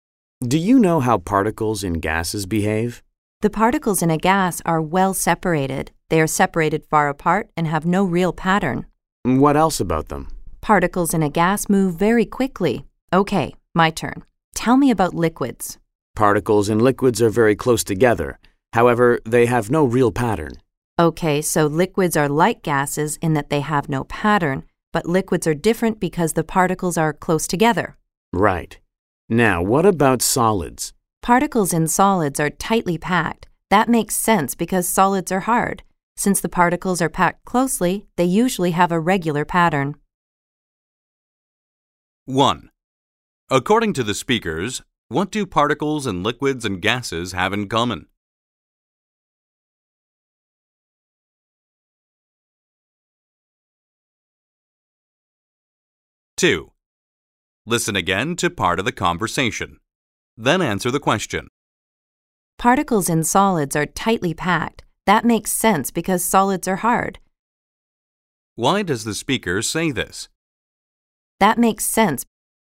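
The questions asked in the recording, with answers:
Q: According to the speakers, what do particles in liquids and gases have in common?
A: They have no real pattern.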